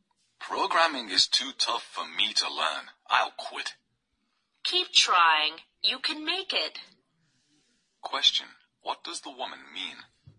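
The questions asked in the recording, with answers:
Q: What does the woman mean?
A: The man should keep trying to learn programming.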